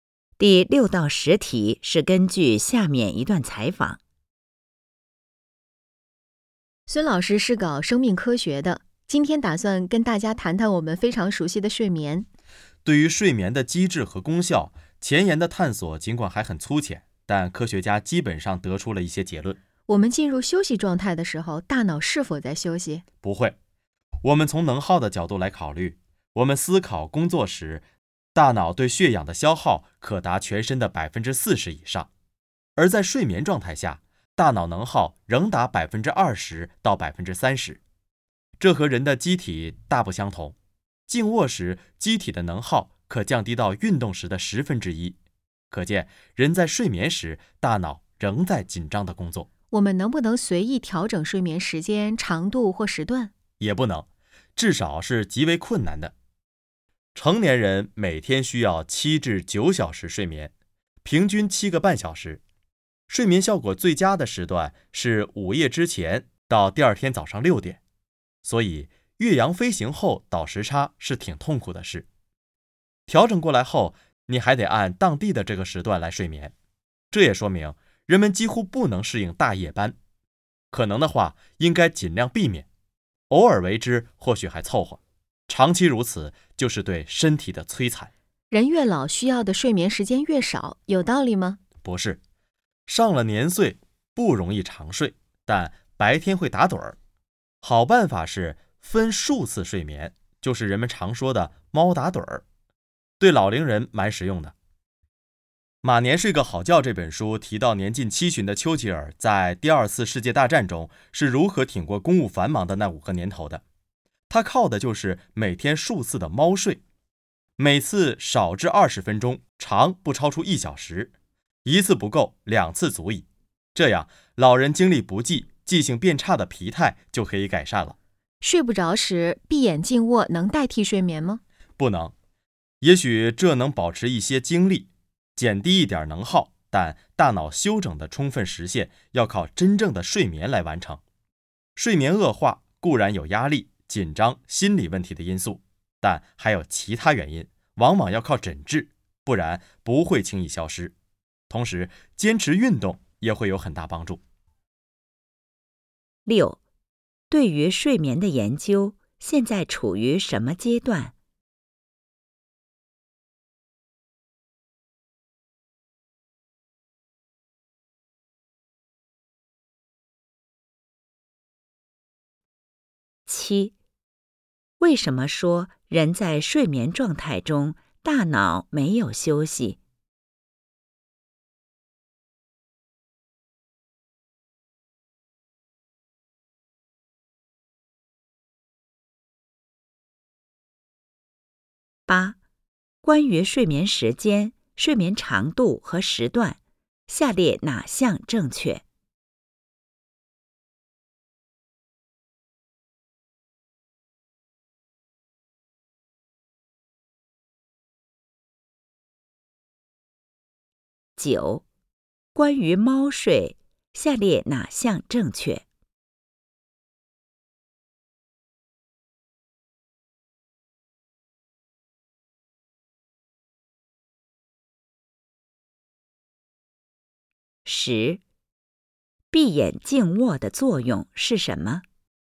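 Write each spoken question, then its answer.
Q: 对于睡眠的研究现在处于什么阶段?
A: 前沿探索还很粗浅,但已得出一些基本结论

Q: 为什么说人在睡眠状态中大脑没有休息?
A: 睡眠时大脑能耗仍达全身的20%到30%

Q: 闭眼静卧的作用是什么?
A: 能保持一些精力,减低一点能耗,但不能代替睡眠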